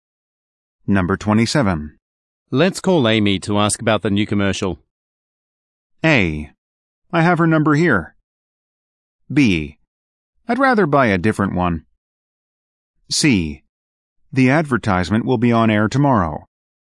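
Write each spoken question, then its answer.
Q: Let's call Amy to ask about the new commercial.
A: A: I have her number here.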